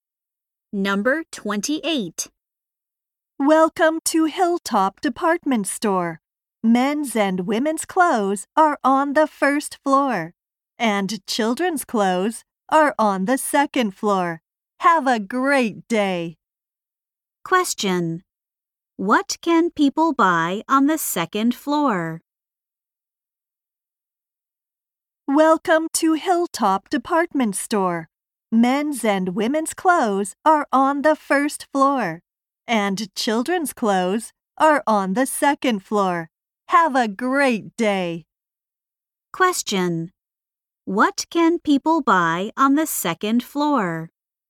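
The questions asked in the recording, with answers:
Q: What can people buy on the second floor?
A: Children's clothes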